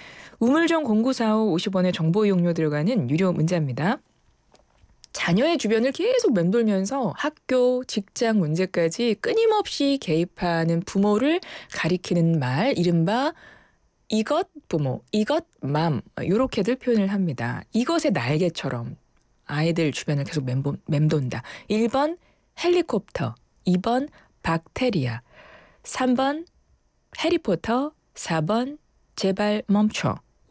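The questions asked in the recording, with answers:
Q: 자녀의 주변을 계속 맴돌면서 학교, 직장 문제까지 끊임없이 개입하는 부모를 가리키는 말, 이른바 이것 부모, 이것 맘, 이렇게들 표현을 합니다.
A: 1번: 헬리콥터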